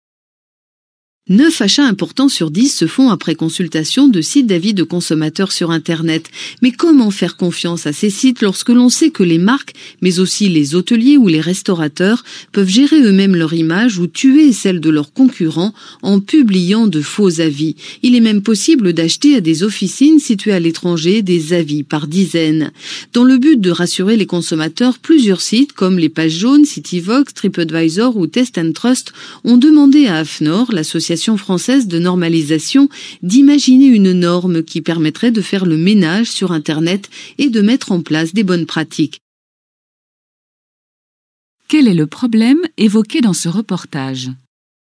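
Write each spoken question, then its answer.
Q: Quel est le problème évoqué dans ce reportage ?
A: Les faux avis de consommateurs publiés sur les sites d'avis en ligne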